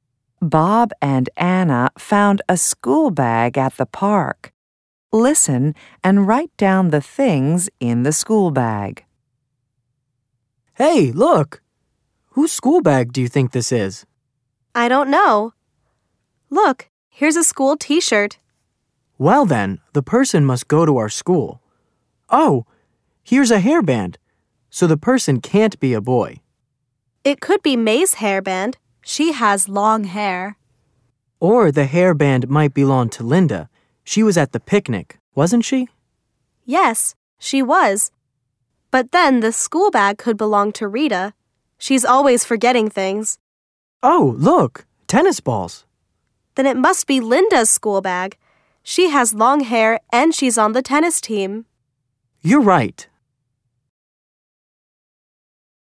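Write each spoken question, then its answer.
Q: Listen and write down the things in the school bag.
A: a school t-shirt, a hairband, tennis balls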